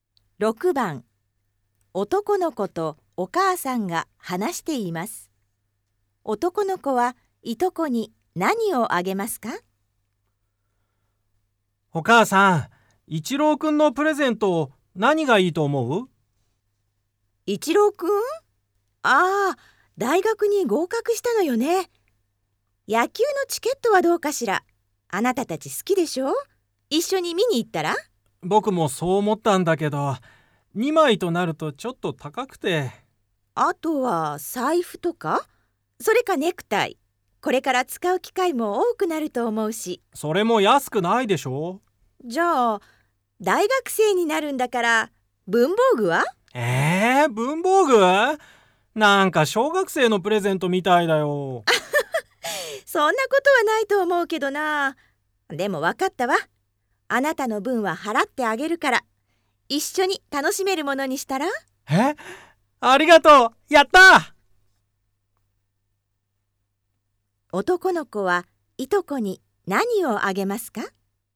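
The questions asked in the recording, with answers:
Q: 男の子はいとこに何をあげますか?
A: 野球のチケット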